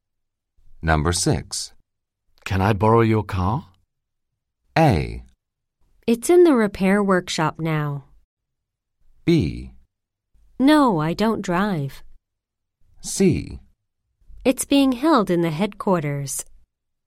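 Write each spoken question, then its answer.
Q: Can I borrow your car?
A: A: It's in the repair workshop now.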